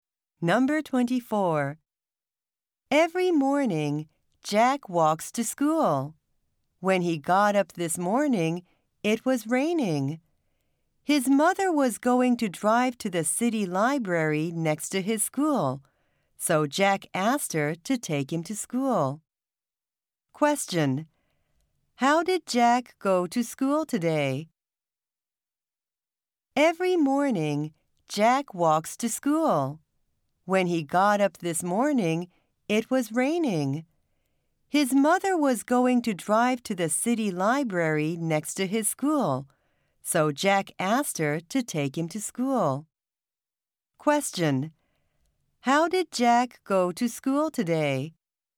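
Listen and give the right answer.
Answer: By car; his mother drove him.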